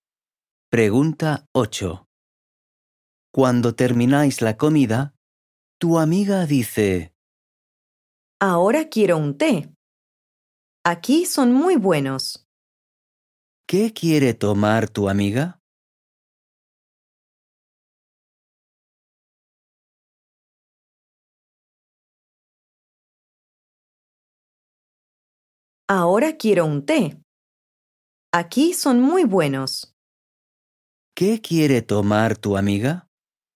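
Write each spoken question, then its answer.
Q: ¿Qué quiere tomar tu amiga?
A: Un té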